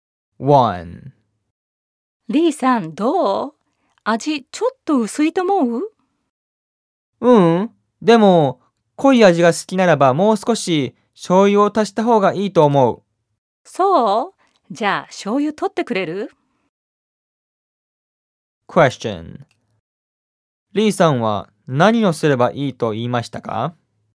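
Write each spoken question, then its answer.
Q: リーさんは何をすればいいと言いましたか?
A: もう少し醤油を足した方がいい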